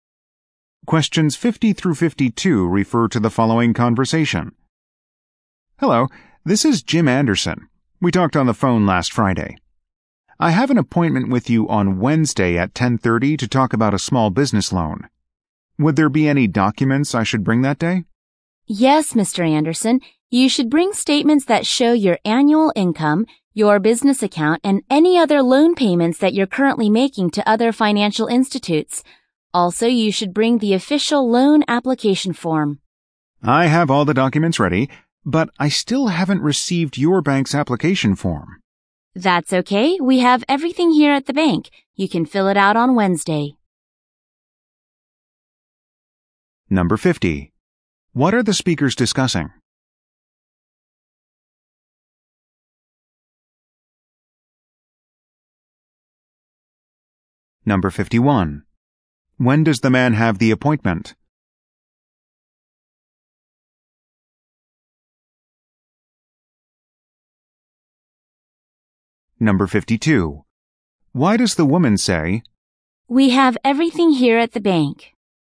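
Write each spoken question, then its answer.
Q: What are the speakers discussing?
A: Documents for a small business loan appointment

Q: When does the man have the appointment?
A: Wednesday at 10:30

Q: Why does the woman say,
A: He can fill out the application form at the bank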